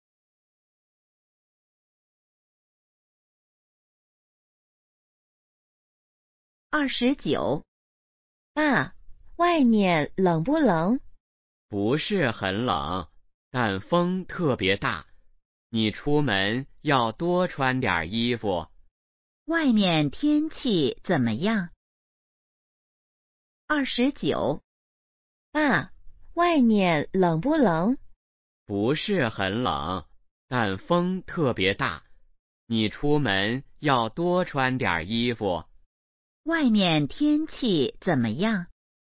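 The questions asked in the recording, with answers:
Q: 外面天气怎么样?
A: 不是很冷,但风特别大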